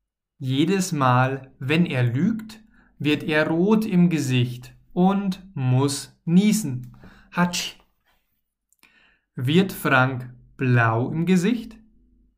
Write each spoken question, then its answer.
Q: Wird Frank blau im Gesicht?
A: Nein, Frank wird nicht blau im Gesicht.